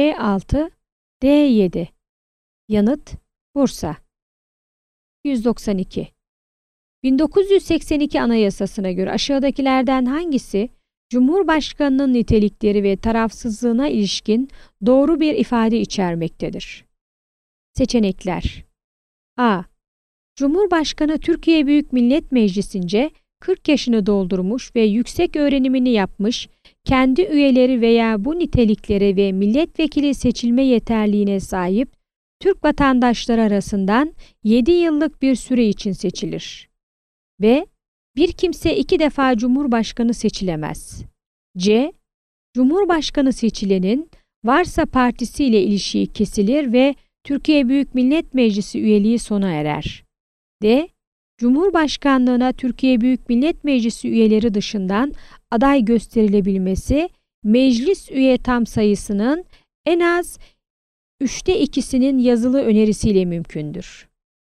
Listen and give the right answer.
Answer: Yanıt: Ceyhan.